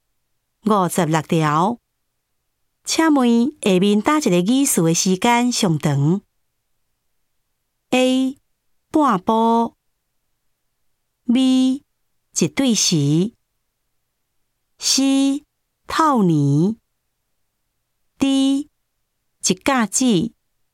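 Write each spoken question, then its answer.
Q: 请问下面打一个意思的时间上长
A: D: 一甲子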